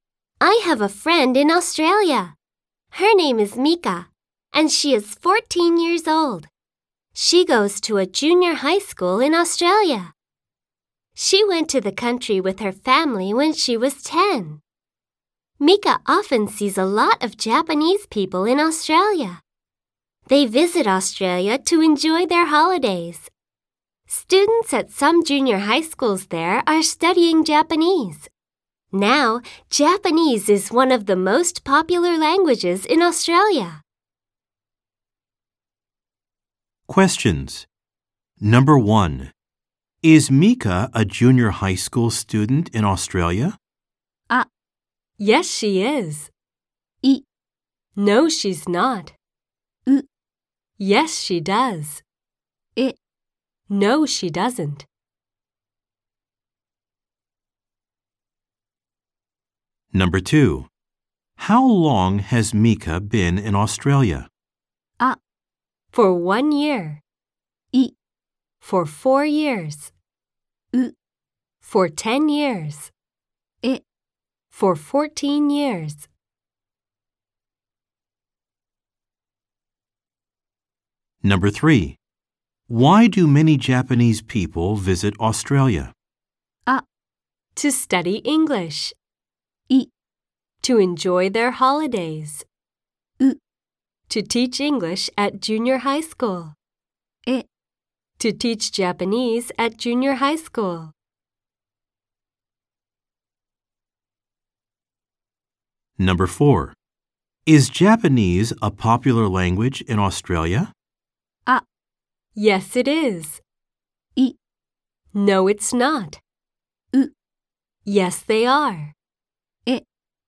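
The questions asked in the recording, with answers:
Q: Is Mika a junior high school student in Australia?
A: あ: Yes, she is.

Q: How long has Mika been in Australia?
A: い: For 4 years.

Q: Why do many Japanese people visit Australia?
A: い: To enjoy their holidays.

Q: Is Japanese a popular language in Australia?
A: あ: Yes, it is.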